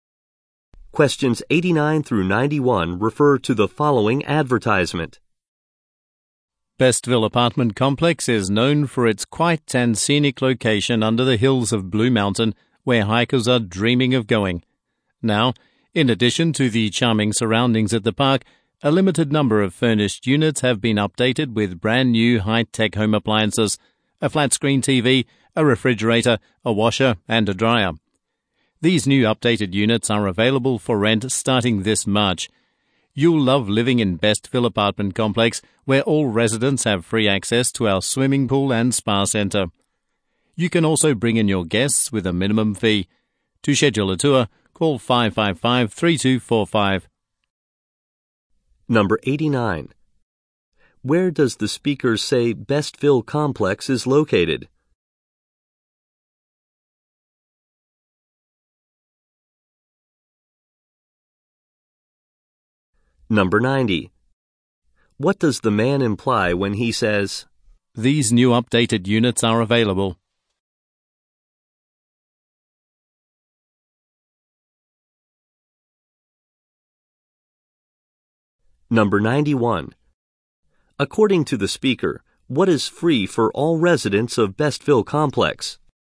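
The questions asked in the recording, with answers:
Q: Where does the speaker say Bestville Complex is located?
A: Under the hills of Blue Mountain

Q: According to the speaker, what is free for all residents of Bestville Complex?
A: Access to the swimming pool and spa center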